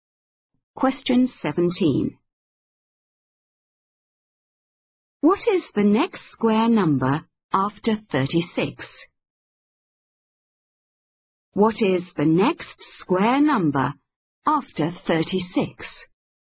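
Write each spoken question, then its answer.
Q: What is the next square number after 36?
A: 49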